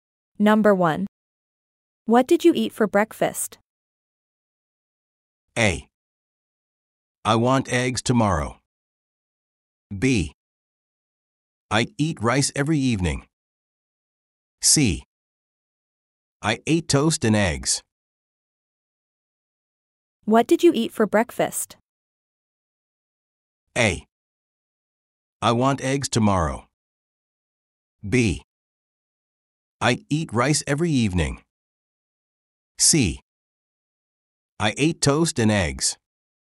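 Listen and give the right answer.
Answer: C: I ate toast and eggs.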